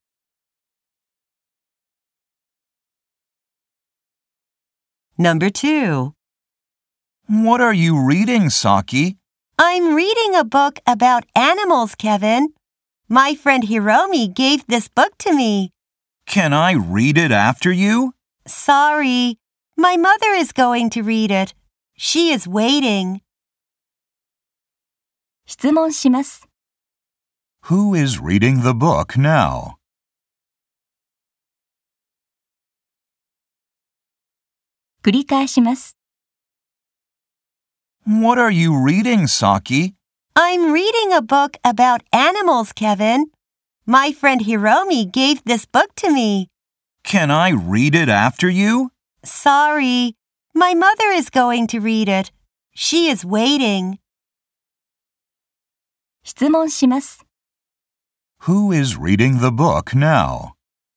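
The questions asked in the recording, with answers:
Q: Who is reading the book now?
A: Saki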